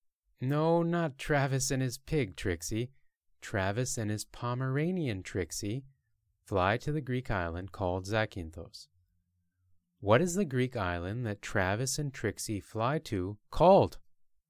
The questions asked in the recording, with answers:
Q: What is the Greek island that Travis and Trixie fly to called?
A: It's called Zakynthos.